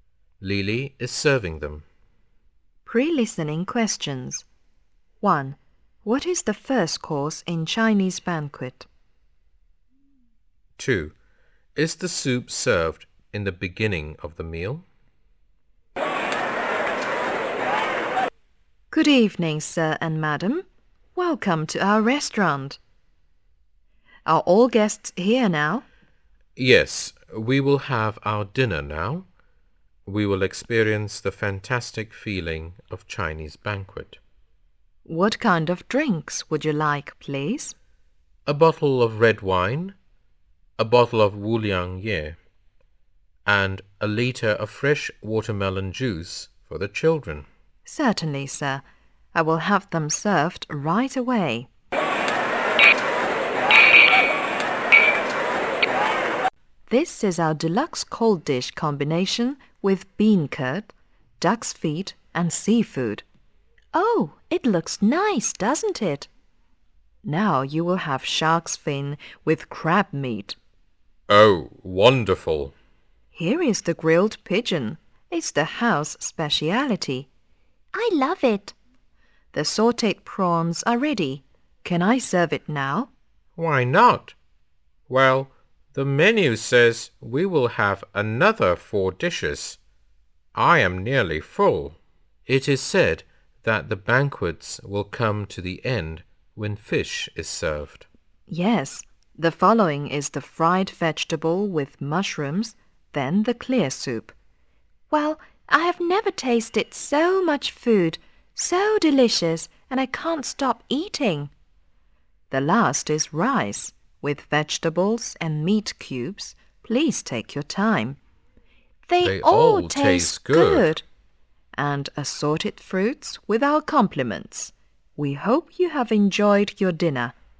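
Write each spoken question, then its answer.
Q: What is the first course in Chinese banquet?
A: A deluxe cold dish combination

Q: Is the soup served in the beginning of the meal?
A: No, the clear soup is served near the end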